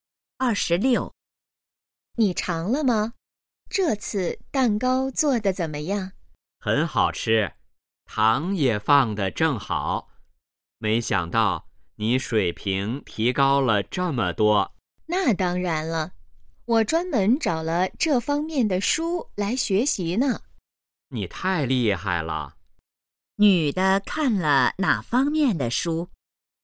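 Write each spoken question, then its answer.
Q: 女的看了哪方面的书?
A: 做蛋糕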